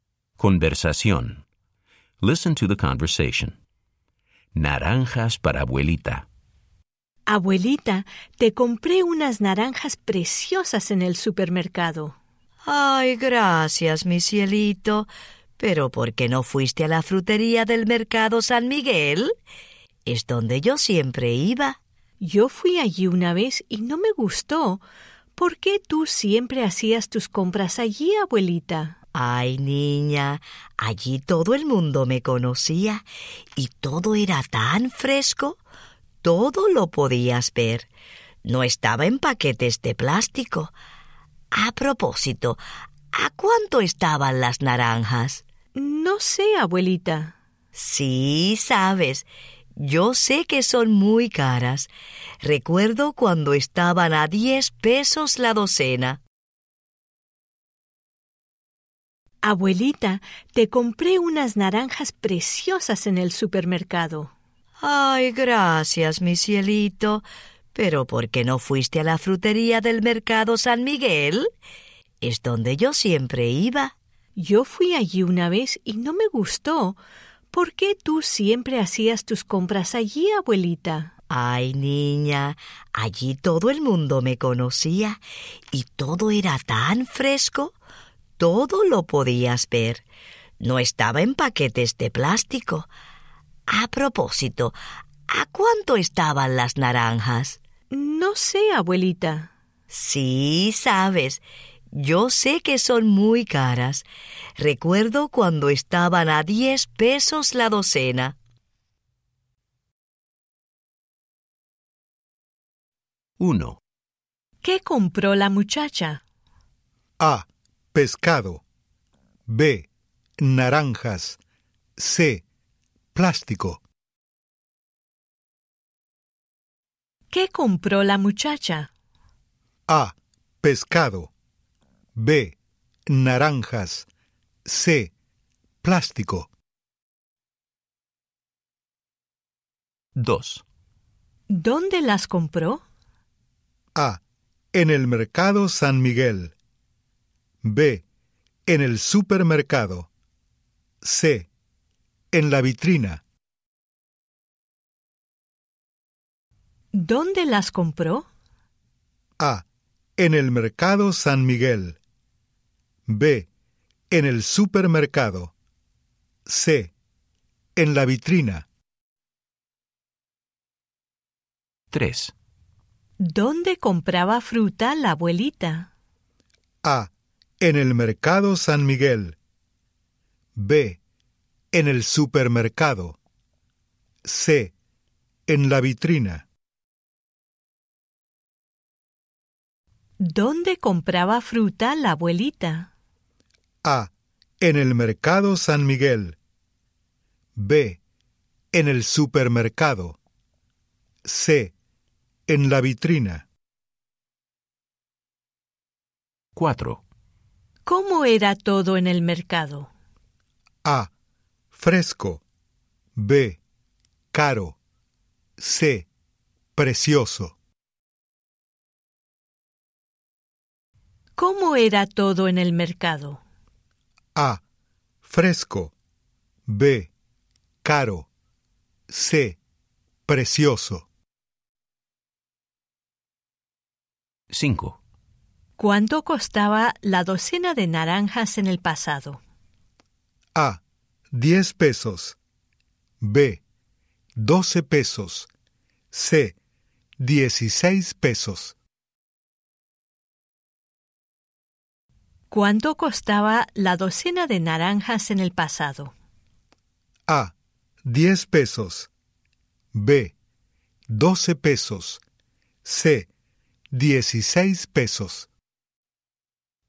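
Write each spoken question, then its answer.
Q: ¿Qué compró la muchacha?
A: B: Naranjas

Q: ¿Dónde las compró?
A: B: En el supermercado

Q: ¿Dónde compraba fruta la abuelita?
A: A: En el Mercado San Miguel

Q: ¿Cómo era todo en el mercado?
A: A: Fresco

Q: ¿Cuánto costaba la docena de naranjas en el pasado?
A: A: 10 pesos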